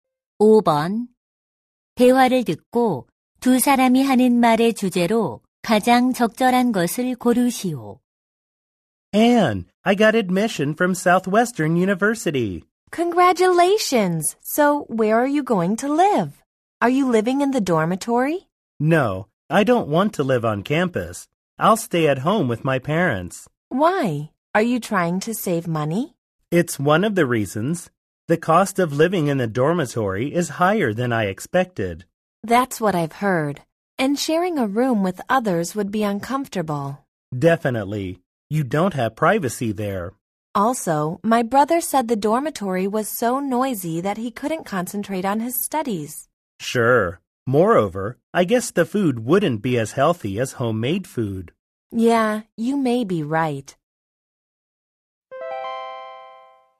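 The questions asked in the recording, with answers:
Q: 대화를 듣고 두 사람이 하는 말의 주제로 가장 적절한 것을 고르시오.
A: 기숙사 생활의 단점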